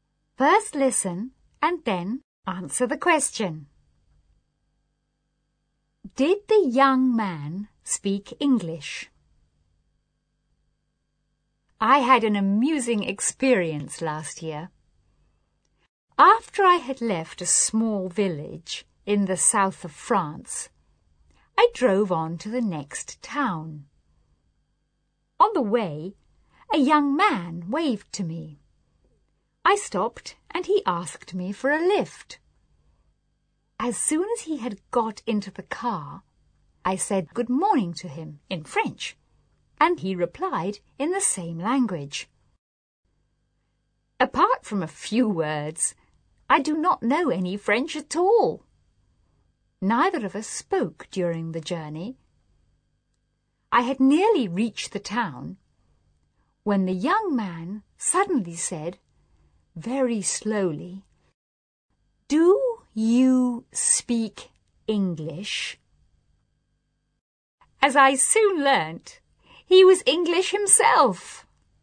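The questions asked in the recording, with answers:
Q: Did the young man speak English?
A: Yes, he was English himself.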